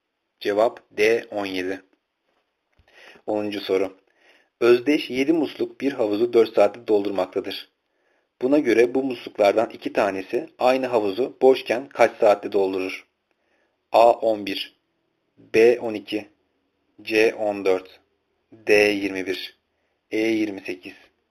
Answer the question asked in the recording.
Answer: Cevap C 14.